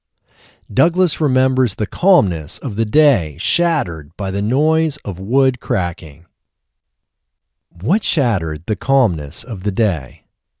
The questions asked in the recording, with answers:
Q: What shattered the calmness of the day?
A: The noise of wood cracking shattered the calmness of the day.